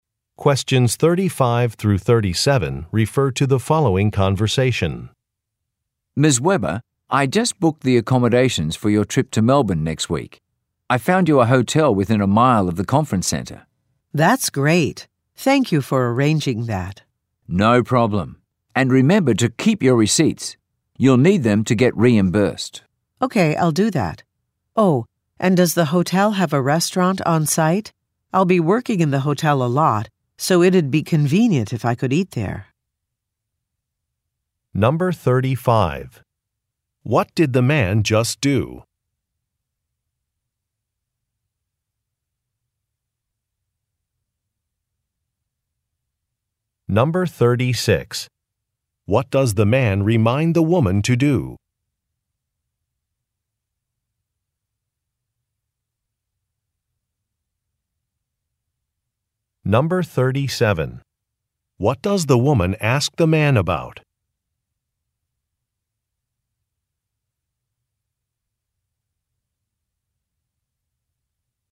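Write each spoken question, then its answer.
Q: What did the man just do?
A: Booked hotel accommodations for her trip

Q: What does the man remind the woman to do?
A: Keep her receipts

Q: What does the woman ask the man about?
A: Whether the hotel has a restaurant on site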